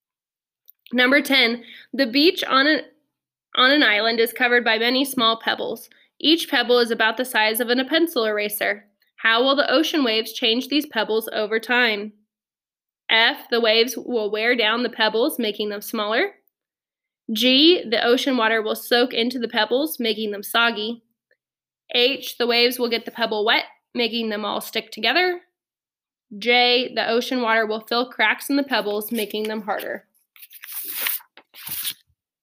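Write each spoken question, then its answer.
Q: How will the ocean waves change these pebbles over time?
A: F: the waves will wear down the pebbles, making them smaller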